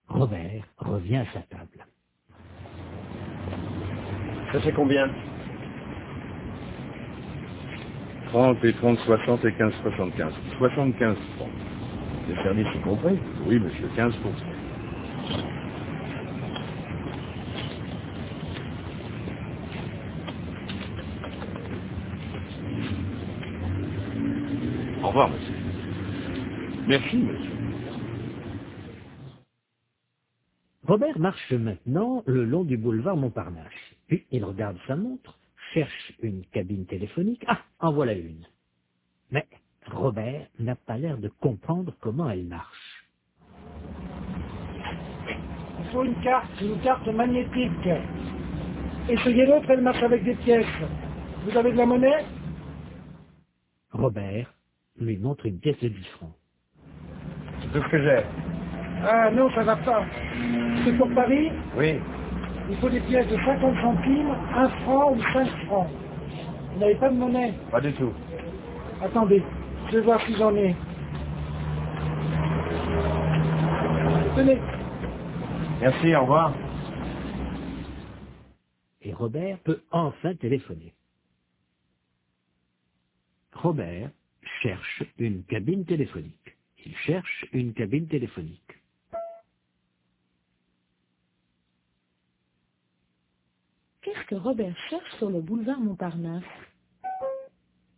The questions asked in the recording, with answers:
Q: Qu'est-ce que Robert cherche sur le boulevard Montparnasse ?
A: Une cabine téléphonique.